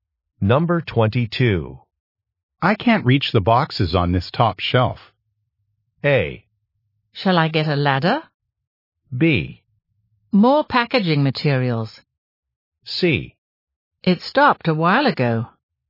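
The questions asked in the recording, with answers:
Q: I can't reach the boxes on this top shelf.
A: A: Shall I get a ladder?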